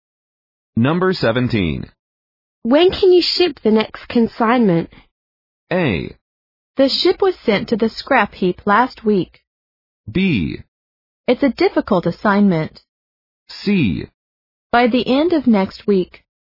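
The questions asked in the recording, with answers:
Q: When can you ship the next consignment?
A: C: By the end of next week.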